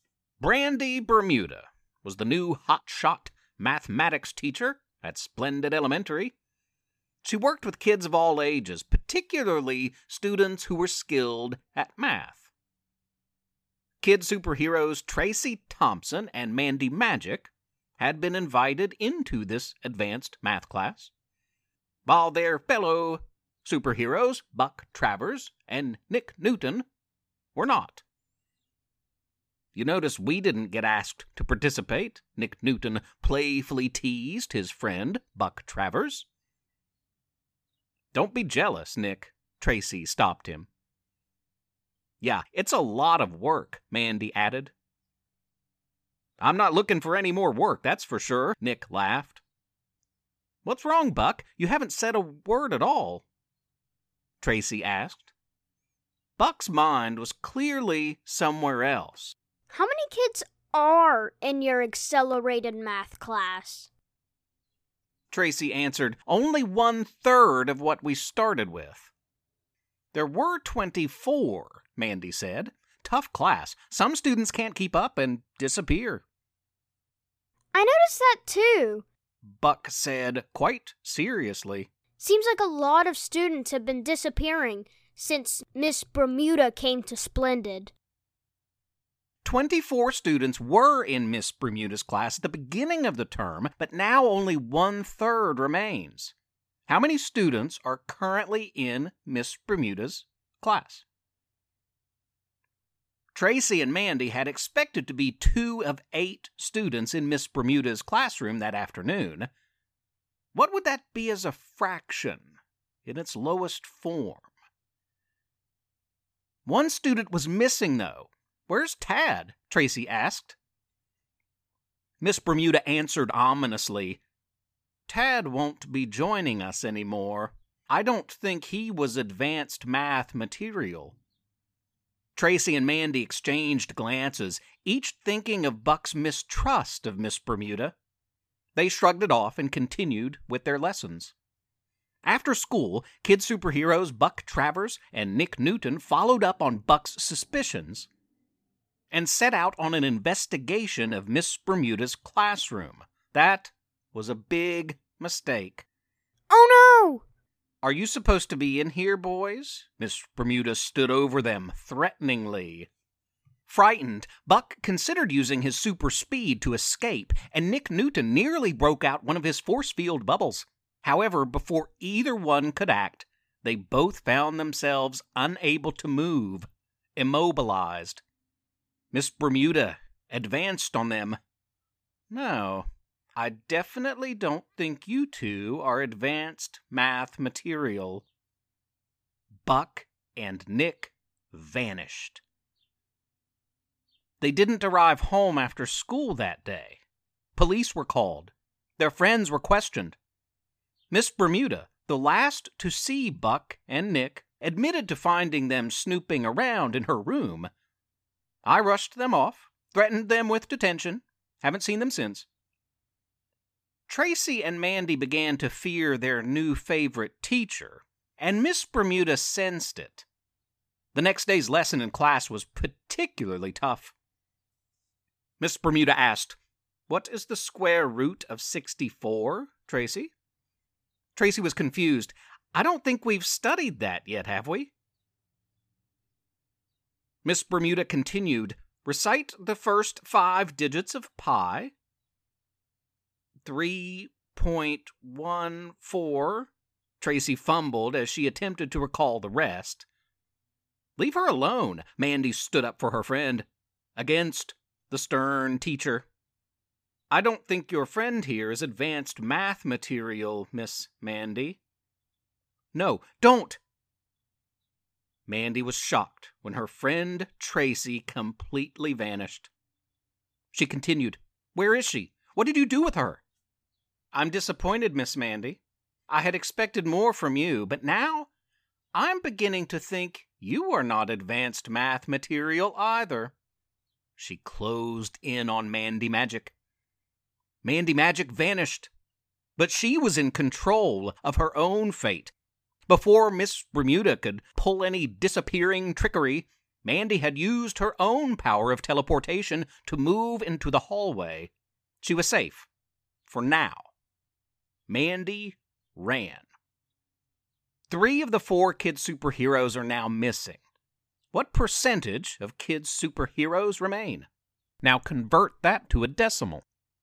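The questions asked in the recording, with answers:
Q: What would that be as a fraction in its lowest form?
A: 1/4

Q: What percentage of kid superheroes remain?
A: 25%

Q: Now convert that to a decimal.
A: 0.25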